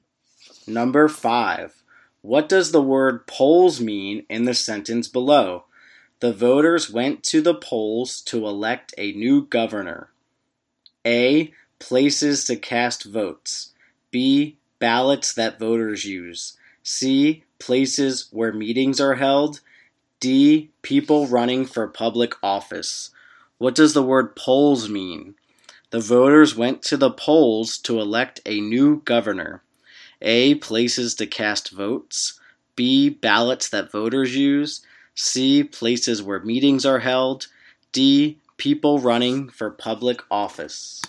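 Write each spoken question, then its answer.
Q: What does the word polls mean in the sentence below?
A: A: Places to cast votes.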